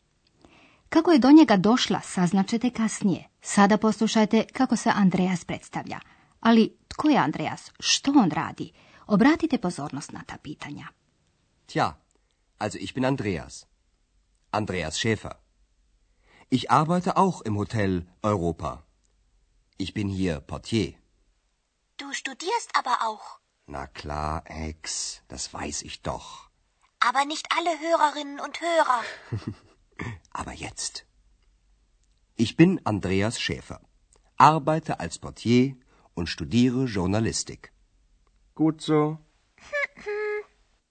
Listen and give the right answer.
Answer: Kao što ste čuli, Andreas također radi u Hotelu Europa.